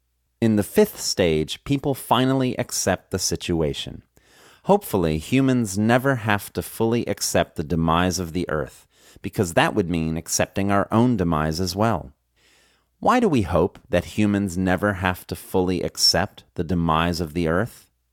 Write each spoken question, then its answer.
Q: Why do we hope that humans never have to fully accept the demise of the Earth?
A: We hope humans never have to fully accept the demise of the Earth, because that would mean accepting our own demise as well.